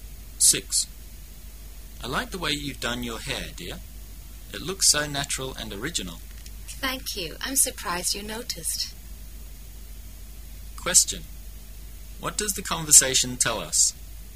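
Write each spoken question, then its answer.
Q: What does the conversation tell us?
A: The woman has a new hairstyle and is surprised the man noticed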